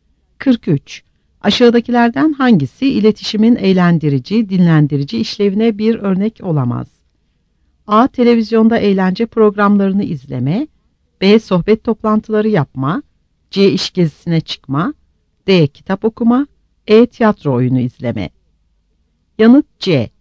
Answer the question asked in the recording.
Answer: Yanıt C.